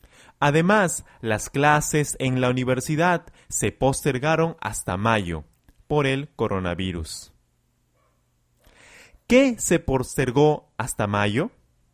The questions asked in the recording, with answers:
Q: ¿Qué se postergó hasta mayo?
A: Se postergaron las clases en la universidad.